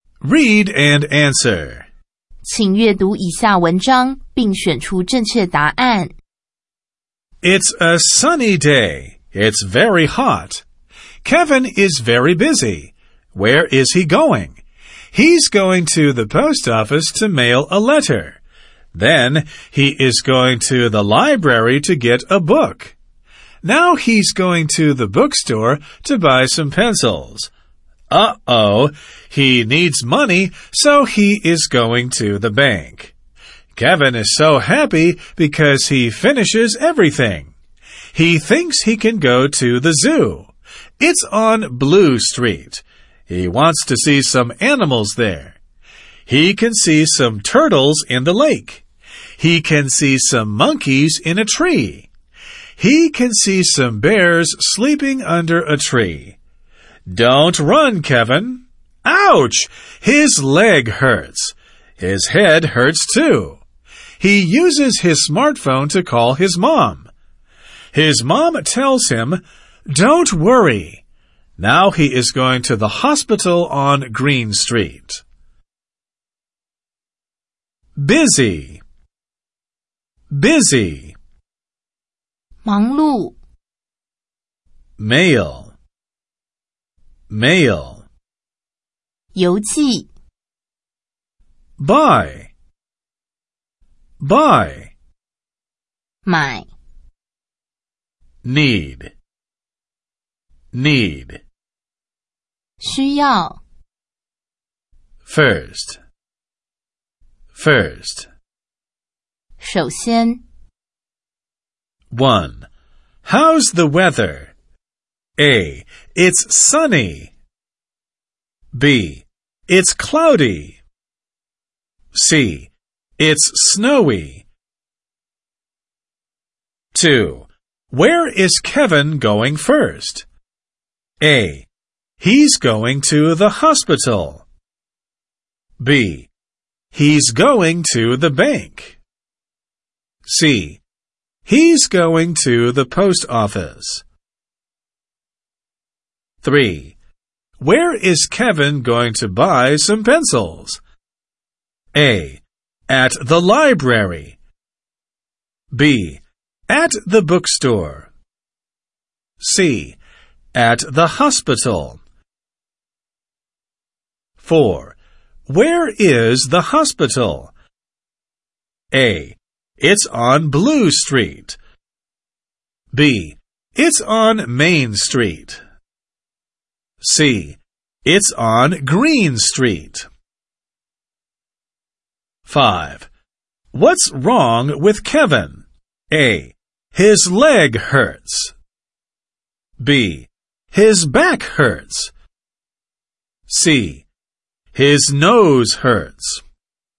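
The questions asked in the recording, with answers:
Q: How's the weather?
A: A: It's sunny.

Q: Where is Kevin going first?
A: C: He's going to the post office.

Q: Where is Kevin going to buy some pencils?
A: B: At the bookstore.

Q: Where is the hospital?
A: C: It's on Green Street.

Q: What's wrong with Kevin?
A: A: His leg hurts.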